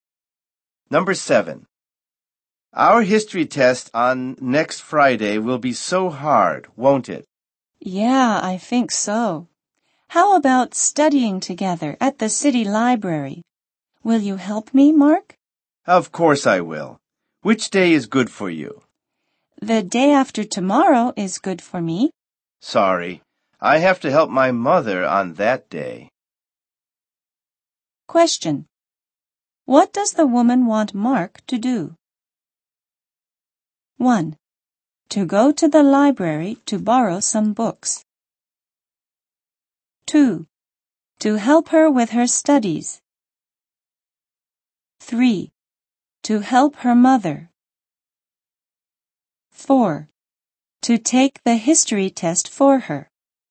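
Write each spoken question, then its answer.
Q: What does the woman want Mark to do?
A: 2: To help her with her studies.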